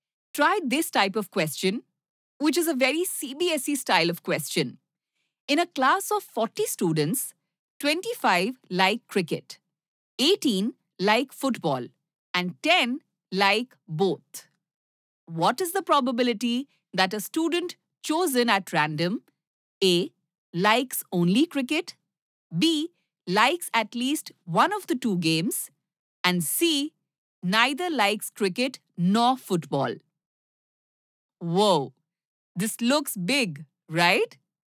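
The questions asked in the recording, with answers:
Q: What is the probability that a student chosen at random A. likes only cricket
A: 15/40 = 3/8

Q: B. likes at least one of the two games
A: 33/40

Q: C. neither likes cricket nor football?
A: 7/40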